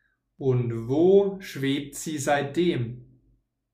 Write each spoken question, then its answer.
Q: Und wo schwebt sie seitdem?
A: Auf Wolke 7. Sie schwebt seitdem auf Wolke 7.